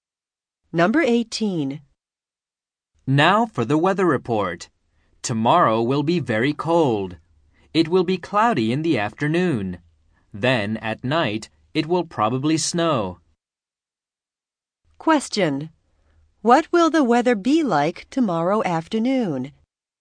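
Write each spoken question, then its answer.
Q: What will the weather be like tomorrow afternoon?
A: Cloudy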